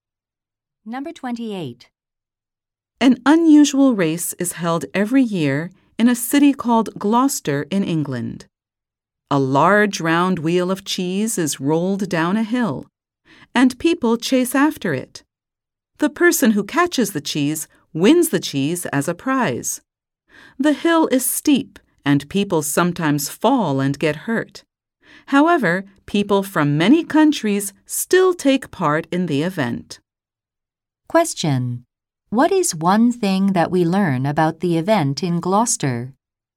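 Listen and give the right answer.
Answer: People from many countries take part, though some get hurt.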